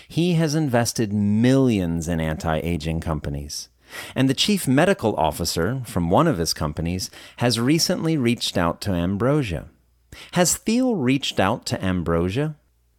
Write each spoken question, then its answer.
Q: Has Thiel reached out to Ambrosia?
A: No, Thiel hasn't reached out to Ambrosia.